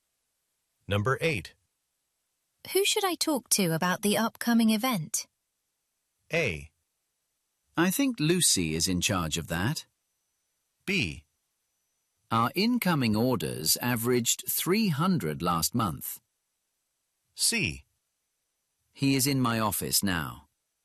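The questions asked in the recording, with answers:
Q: Who should I talk to about the upcoming event?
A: A: I think Lucy is in charge of that.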